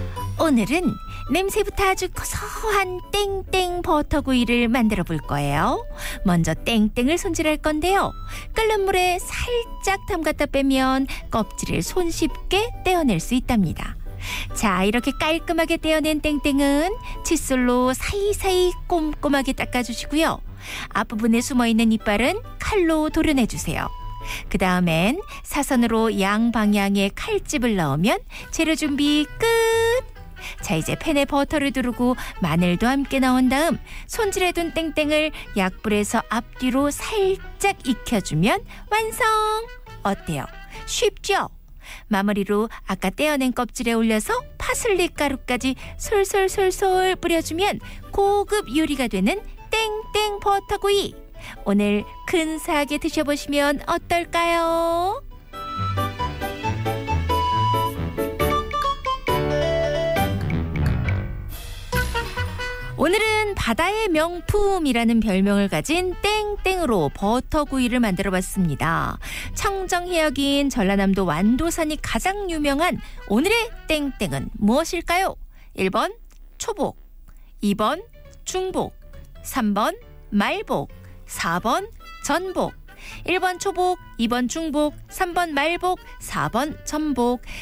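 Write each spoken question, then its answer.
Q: 청정해역인 전라남도 완도산이 가장 유명한 오늘의 땡땡은 무엇일까요?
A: 4번: 전복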